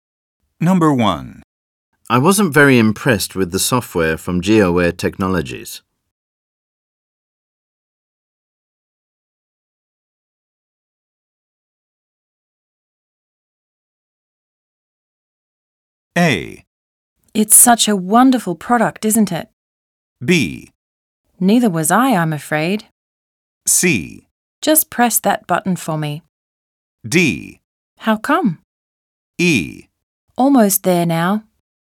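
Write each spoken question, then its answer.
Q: I wasn't very impressed with the software from GeoWare Technologies.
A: B: Neither was I, I'm afraid.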